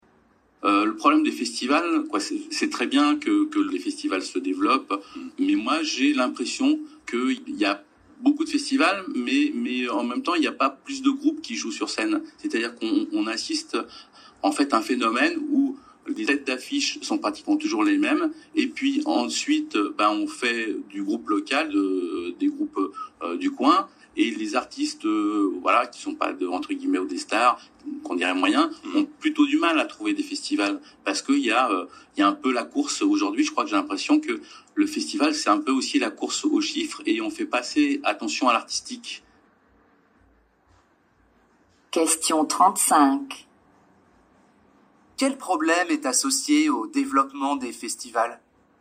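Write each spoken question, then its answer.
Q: Quel problème est associé au développement des festivals ?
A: Les têtes d'affiche sont toujours les mêmes et les artistes moyens ont du mal à trouver des festivals.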